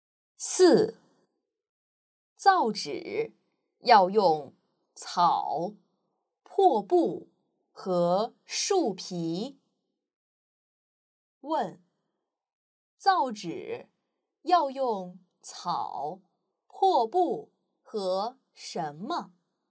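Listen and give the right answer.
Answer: 树皮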